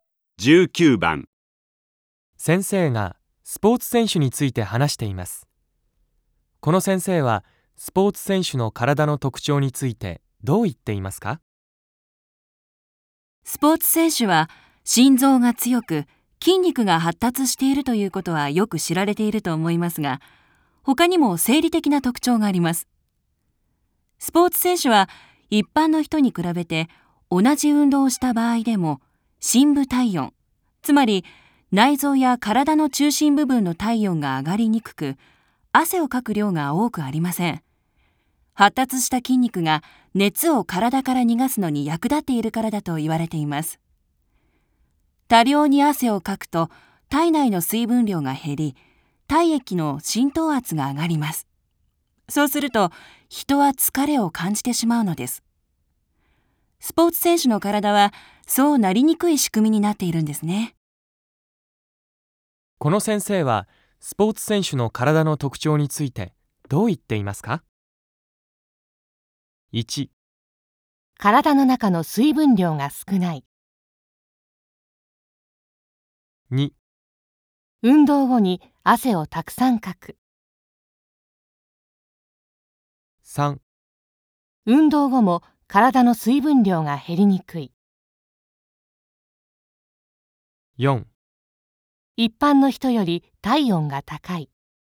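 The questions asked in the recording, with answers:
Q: この先生はスポーツ選手の体の特徴についてどう言っていますか?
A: 3: 運動後も体の水分量が減りにくい。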